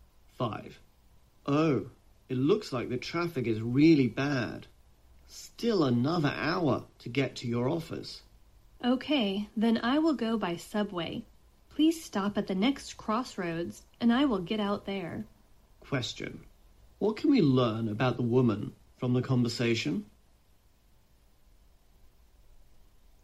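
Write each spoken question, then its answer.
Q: What can we learn about the woman from the conversation?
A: She will get out of the car and take the subway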